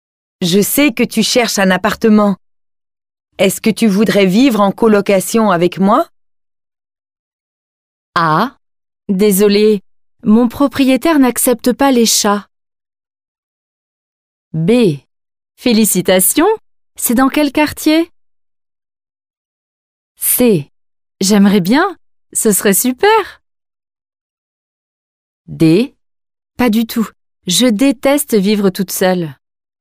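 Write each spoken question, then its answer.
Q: Est-ce que tu voudrais vivre en colocation avec moi?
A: C: J'aimerais bien, ce serait super.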